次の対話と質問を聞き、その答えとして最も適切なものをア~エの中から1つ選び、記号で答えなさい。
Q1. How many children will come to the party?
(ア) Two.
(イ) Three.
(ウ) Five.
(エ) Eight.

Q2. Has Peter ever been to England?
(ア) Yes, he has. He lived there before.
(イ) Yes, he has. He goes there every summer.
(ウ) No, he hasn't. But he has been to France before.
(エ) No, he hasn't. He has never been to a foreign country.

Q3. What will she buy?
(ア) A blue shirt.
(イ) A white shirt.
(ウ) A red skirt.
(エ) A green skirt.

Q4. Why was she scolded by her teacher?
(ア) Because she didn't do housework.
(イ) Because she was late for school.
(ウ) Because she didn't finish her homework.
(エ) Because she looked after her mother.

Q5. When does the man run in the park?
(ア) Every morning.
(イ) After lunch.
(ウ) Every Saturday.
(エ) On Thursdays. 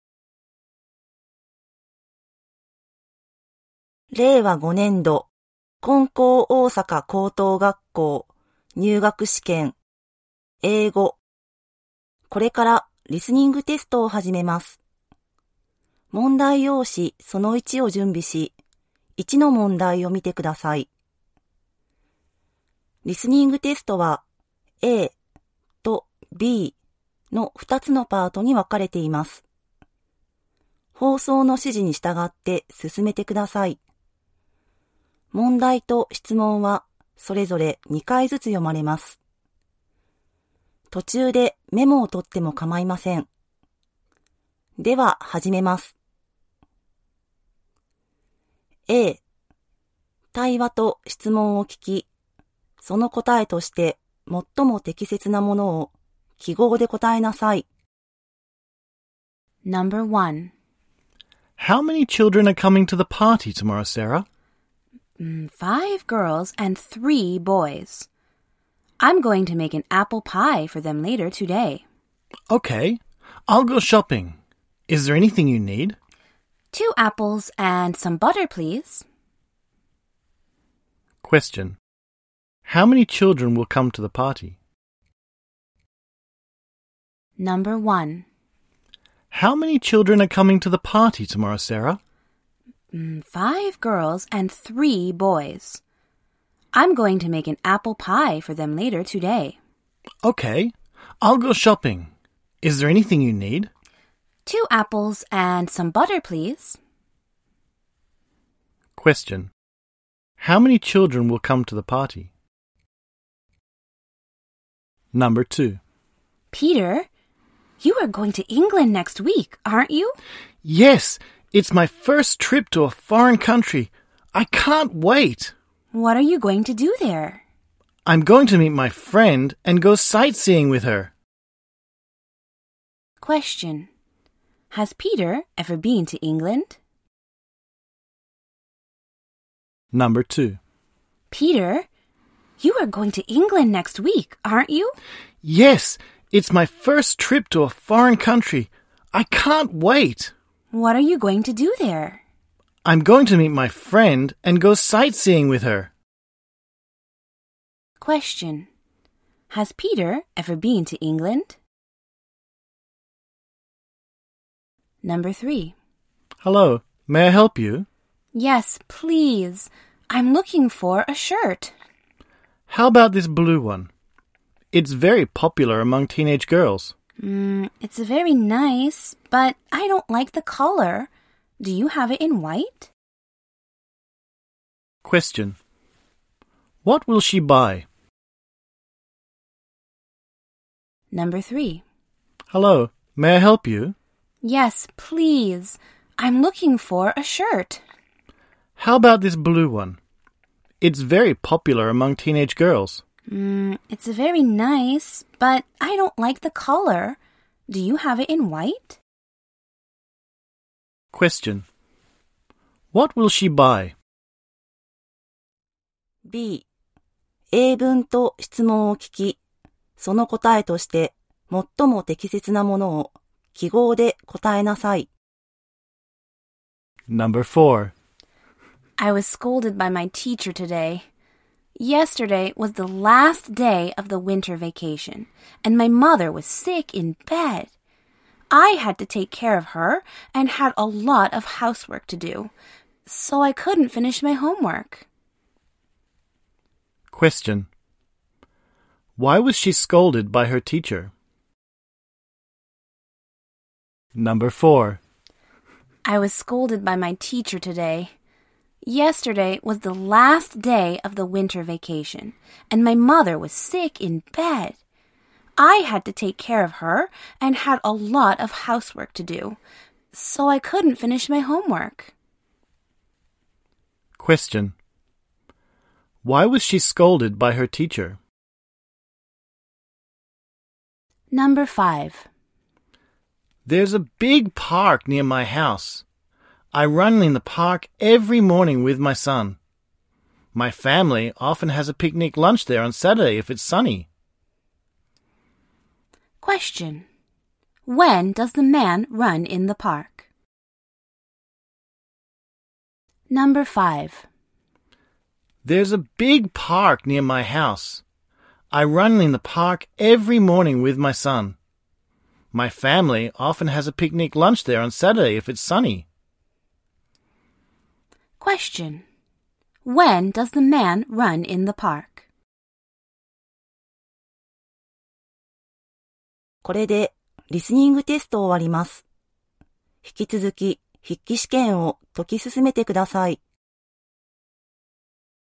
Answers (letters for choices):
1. エ
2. エ
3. イ
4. ウ
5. ア